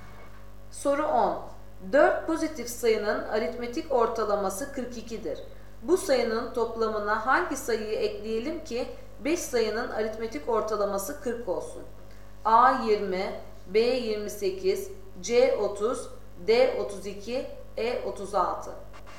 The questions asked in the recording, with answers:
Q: Bu sayının toplamına hangi sayıyı ekleyelim ki 5 sayının aritmetik ortalaması 40 olsun?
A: Doğru cevap D 32.